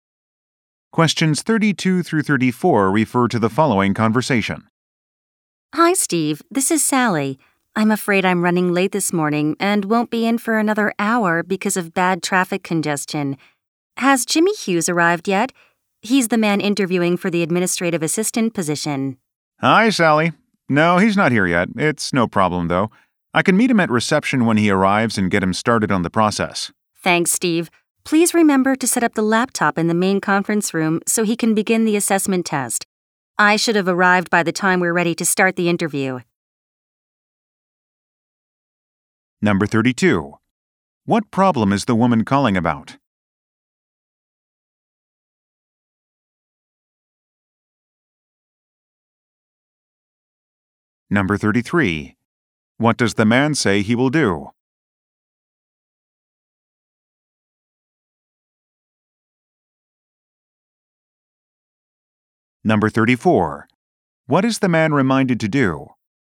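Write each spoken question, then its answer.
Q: What problem is the woman calling about?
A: She is running late because of traffic

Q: What does the man say he will do?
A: Meet the applicant at reception

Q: What is the man reminded to do?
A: Set up the laptop in the conference room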